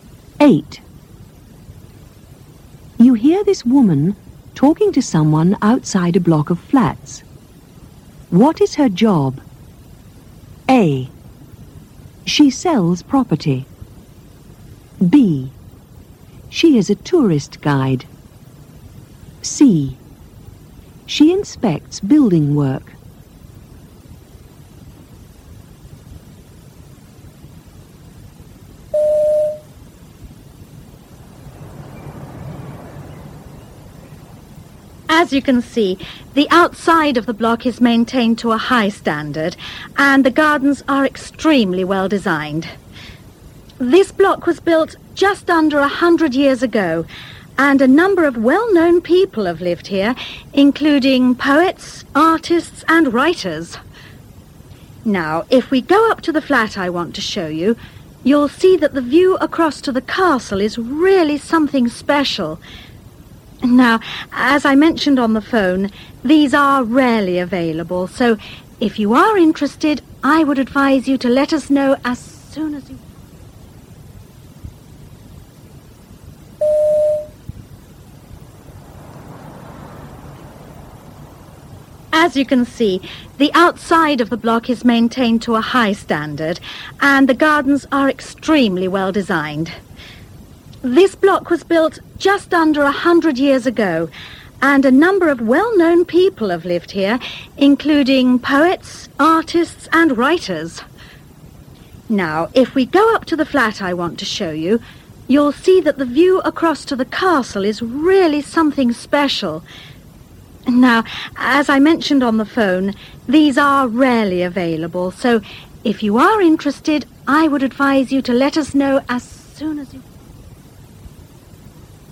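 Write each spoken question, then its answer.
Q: What is her job? A. She sells property. B. She is a tourist guide. C. She inspects building work.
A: A: She sells property.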